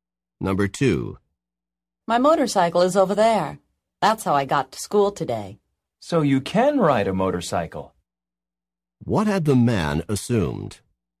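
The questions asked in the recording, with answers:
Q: What had the man assumed?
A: That the woman could not ride a motorcycle.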